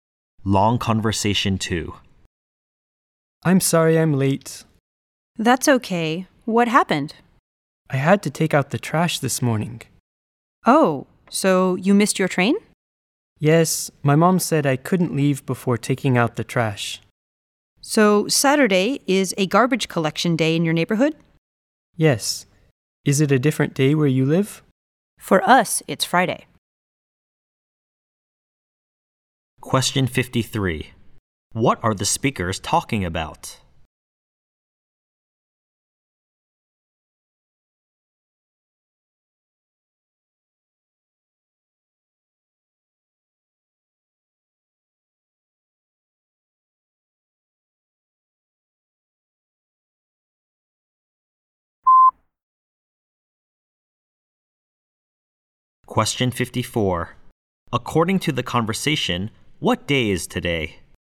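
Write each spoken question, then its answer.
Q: What are the speakers talking about?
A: Why one speaker was late: taking out the trash on garbage collection day

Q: According to the conversation, what day is today?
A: Saturday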